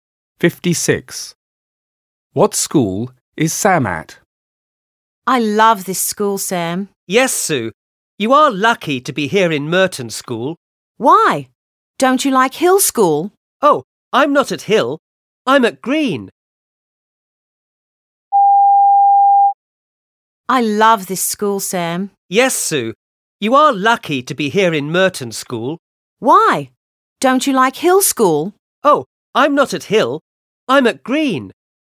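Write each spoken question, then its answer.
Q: What school is Sam at?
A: Green School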